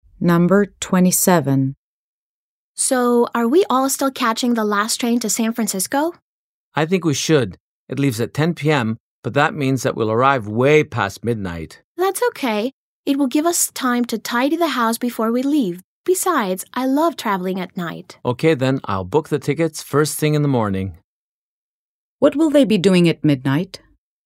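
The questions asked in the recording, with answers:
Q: What will they be doing at midnight?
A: Traveling on the train to San Francisco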